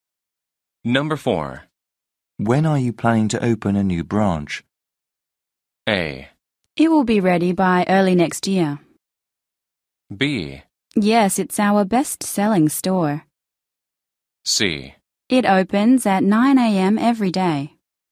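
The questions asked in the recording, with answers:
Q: When are you planning to open a new branch?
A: A: It will be ready by early next year.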